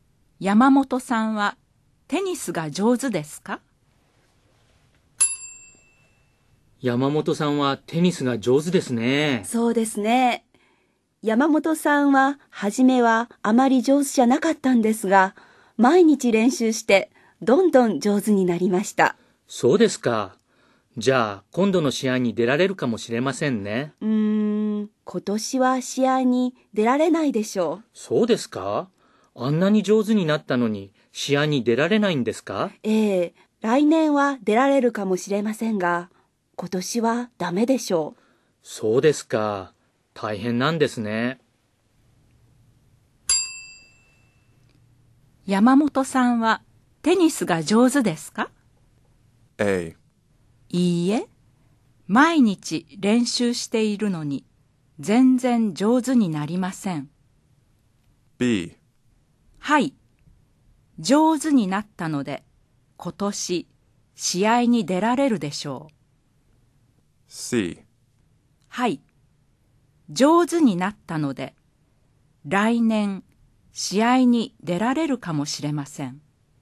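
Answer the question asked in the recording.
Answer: C: はい、上手になったので来年試合に出られるかもしれません。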